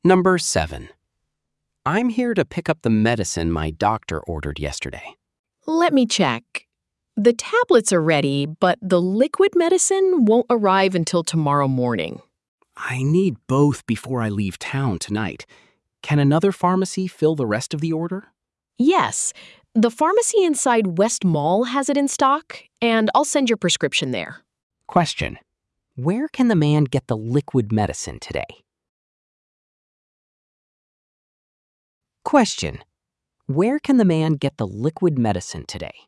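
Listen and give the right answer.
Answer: At the pharmacy inside West Mall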